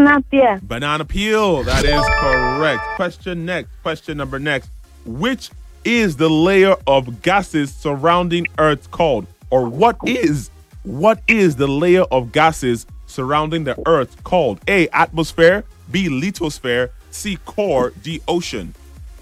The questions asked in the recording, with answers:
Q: What is the layer of gases surrounding the Earth called?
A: Atmosphere, absolutely correct.